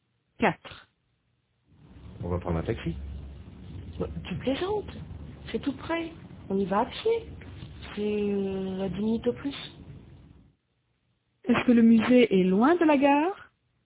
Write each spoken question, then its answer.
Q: Est-ce que le musée est loin de la gare?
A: Non. Tout près. Il est tout près.